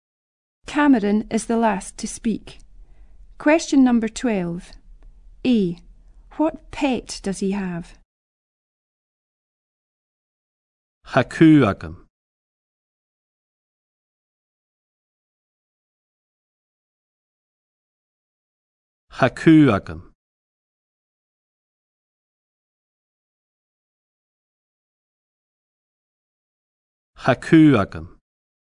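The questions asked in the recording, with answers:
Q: What pet does he have?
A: A dog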